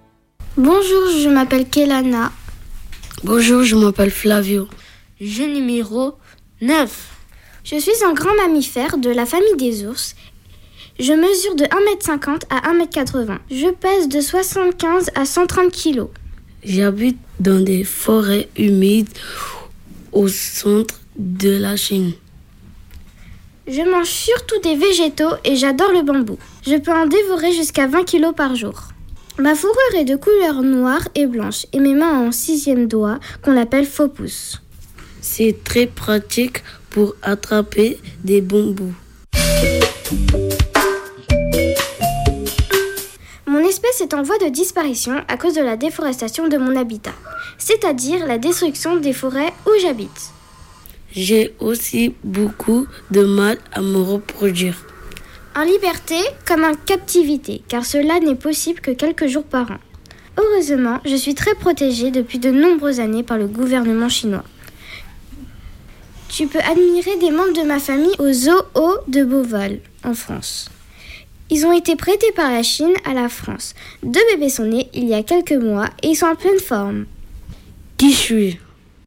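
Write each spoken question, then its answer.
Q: Qui suis-je ?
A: le panda géant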